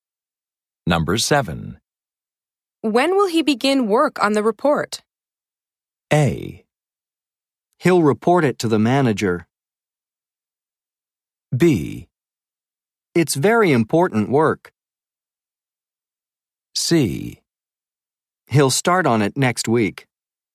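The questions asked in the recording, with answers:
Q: When will he begin work on the report?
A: C: He'll start on it next week.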